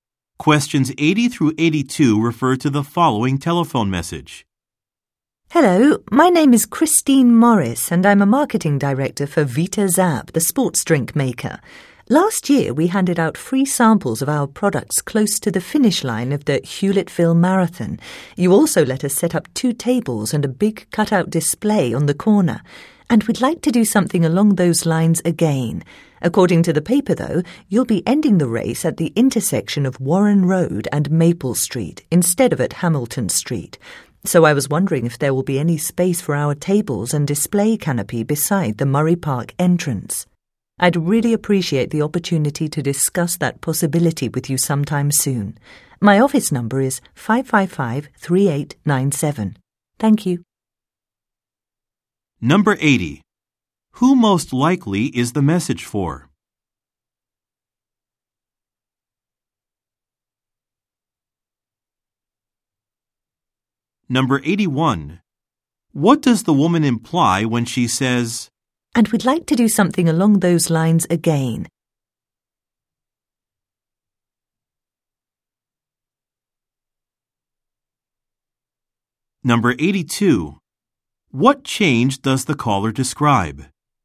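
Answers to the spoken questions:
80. A marathon organizer
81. She wants to hand out free samples and set up a display at the race again
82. The marathon's finish line location has changed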